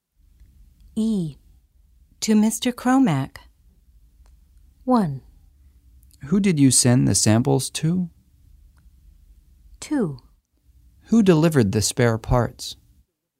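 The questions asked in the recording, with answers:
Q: To Mr. Cromack.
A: 1: Who did you send the samples to?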